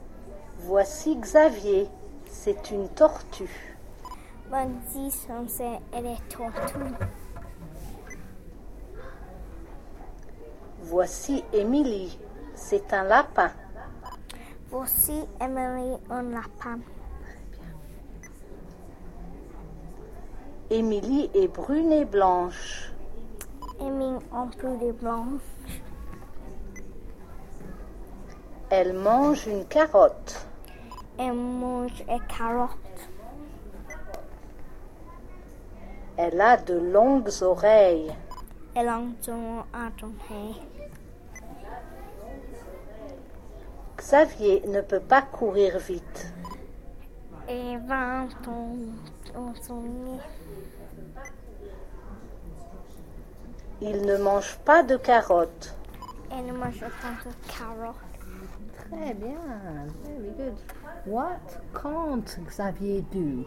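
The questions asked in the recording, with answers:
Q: What can't Xavier do?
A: Run fast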